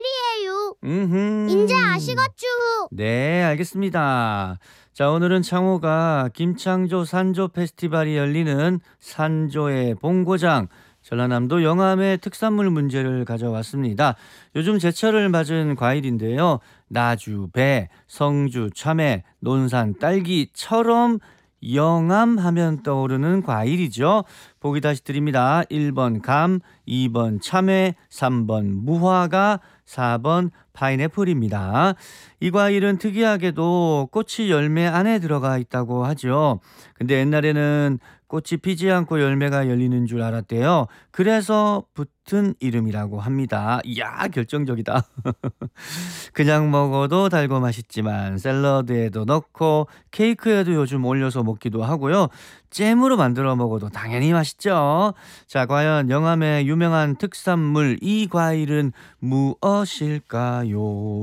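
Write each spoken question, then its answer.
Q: 자, 과연 영암의 유명한 특산물 이 과일은 무엇일까요?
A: 3번: 무화과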